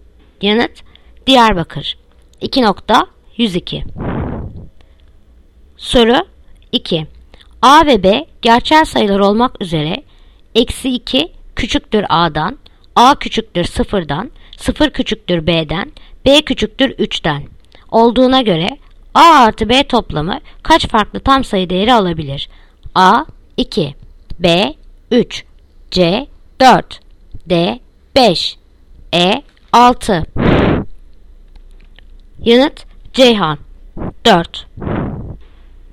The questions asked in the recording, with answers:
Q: A ve B gerçel sayılar olmak üzere eksi 2 küçüktür A'dan, A küçüktür 0'dan, 0 küçüktür B'den, B küçüktür 3'den olduğuna göre A artı B toplamı kaç farklı tam sayı değeri alabilir?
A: Yanıt Ceyhan 4